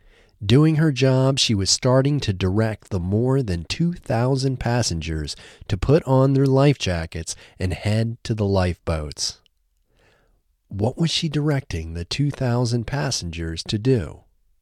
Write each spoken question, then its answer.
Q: What was she directing the 2,000 passengers to do?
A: She was directing the 2,000 passengers to put on their life jackets and head to the lifeboats.